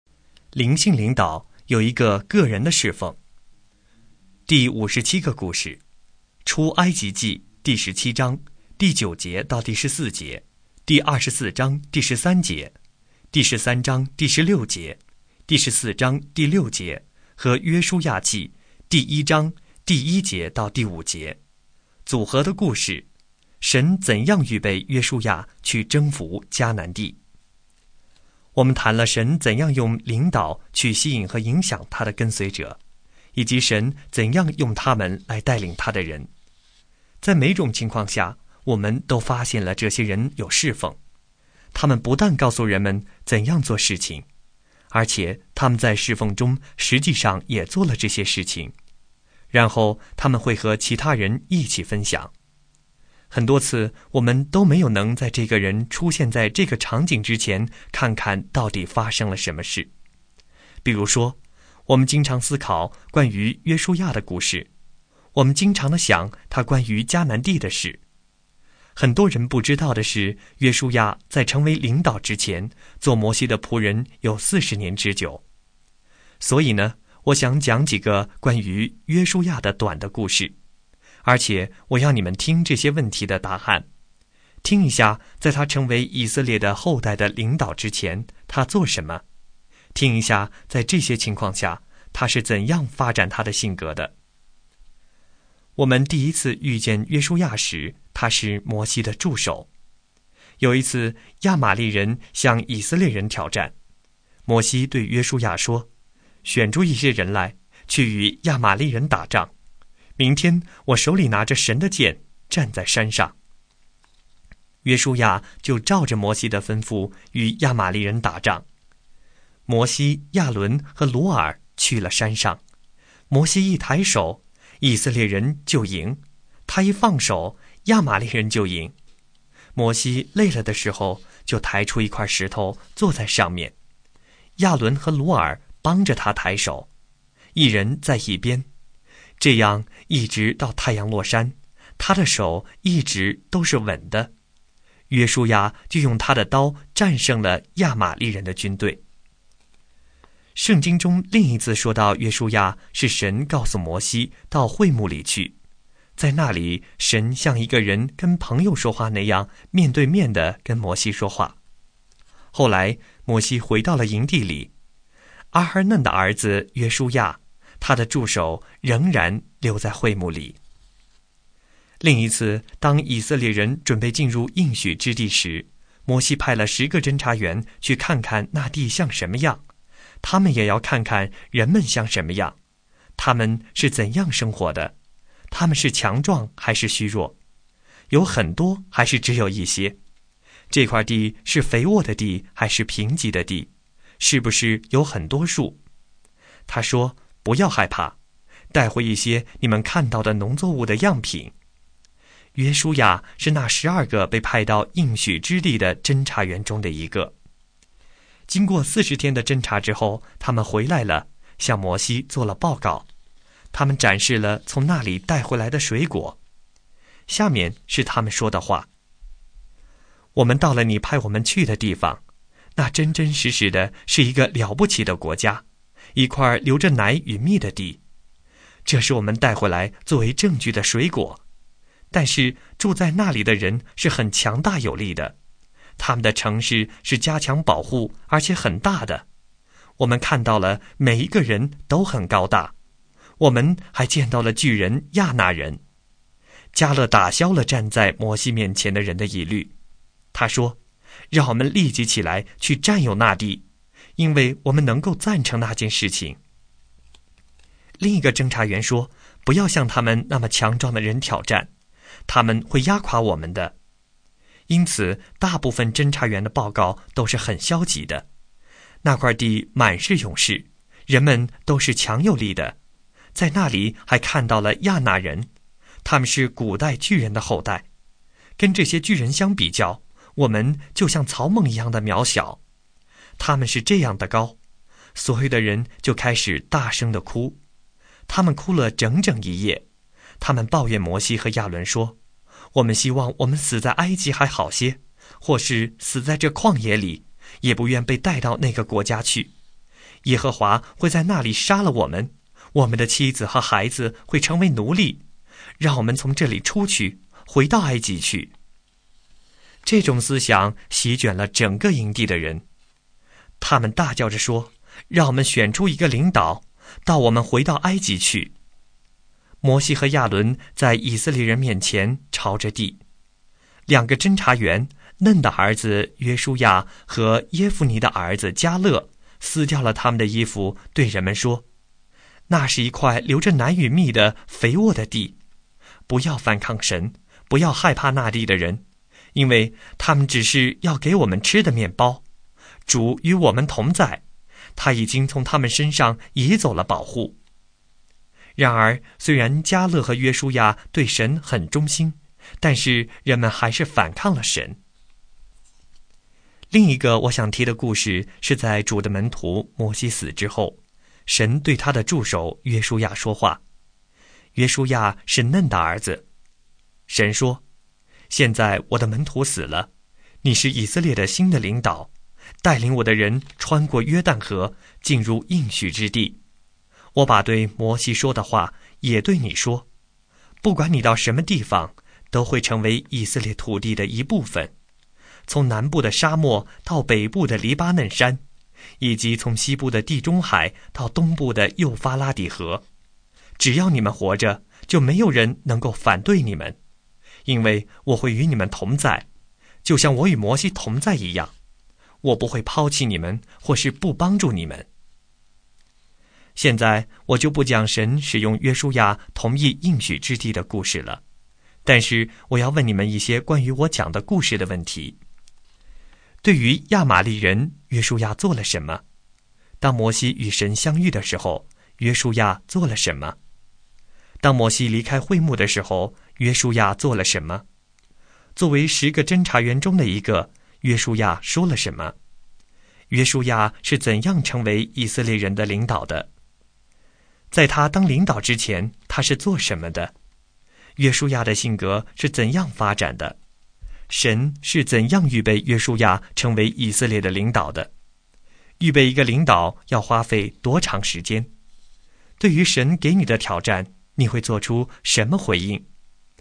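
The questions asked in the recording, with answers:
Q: 对于亚玛利人,约书亚做了什么?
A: 他照摩西的吩咐选人与亚玛利人打仗,用刀战胜了他们

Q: 当摩西离开会幕的时候,约书亚做了什么?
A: 他仍然留在会幕里

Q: 作为十个侦察员中的一个,约书亚说了什么?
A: 那地是流奶与蜜的肥沃之地,不要反抗神,不要害怕那地的人,主与我们同在

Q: 约书亚是怎样成为以色列人的领导的?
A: 摩西死后,神对他说话,让他做以色列的新领导

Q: 在他当领导之前,他是做什么的?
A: 做摩西的仆人(助手)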